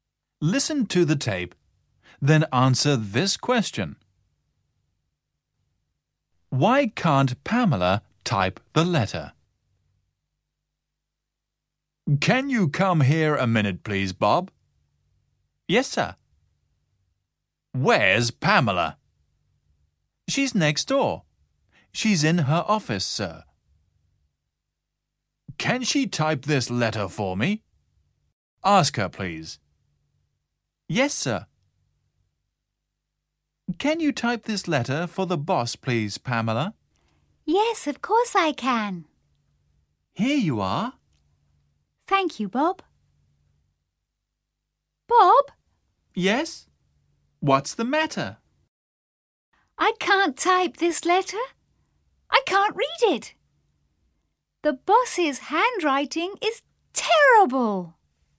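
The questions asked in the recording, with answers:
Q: Why can't Pamela type the letter?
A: Because she can't read it; the boss's handwriting is terrible.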